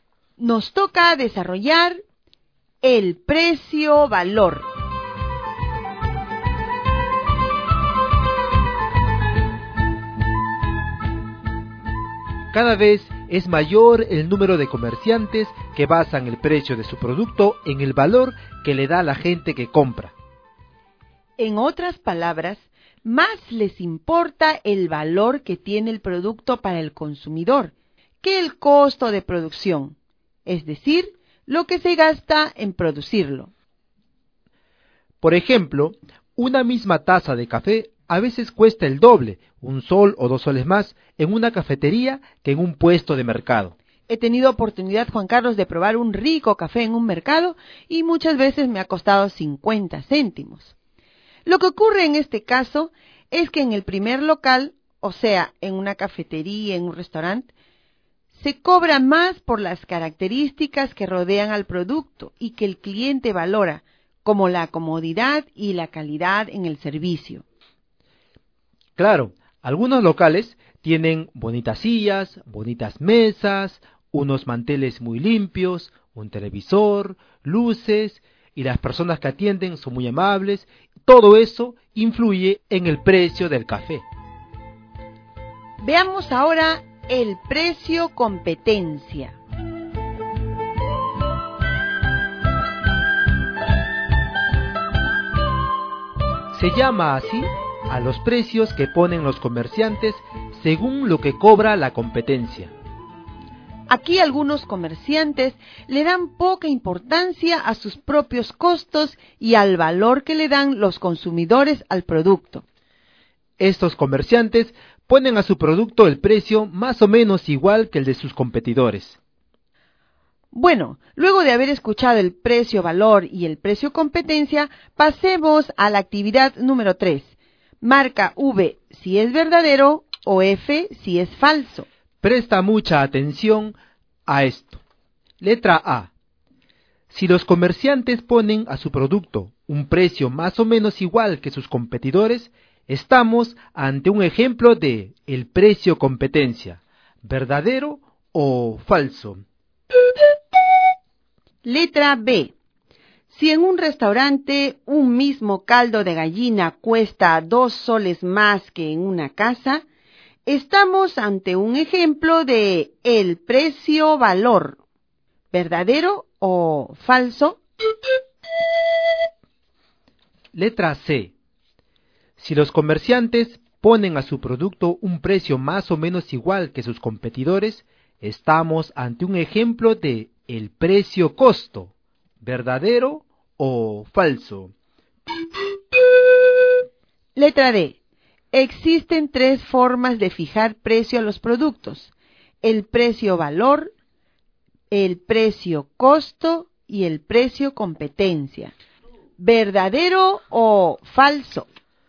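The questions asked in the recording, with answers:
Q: Si los comerciantes ponen a su producto un precio más o menos igual que sus competidores, estamos ante un ejemplo de el precio competencia, ¿verdadero o falso?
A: Verdadero

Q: Si en un restaurante un mismo caldo de gallina cuesta 2 soles más que en una casa, estamos ante un ejemplo de el precio-valor, ¿verdadero o falso?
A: Verdadero

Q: Si los comerciantes ponen a su producto un precio más o menos igual que sus competidores, estamos ante un ejemplo de el precio-costo, ¿verdadero o falso?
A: Falso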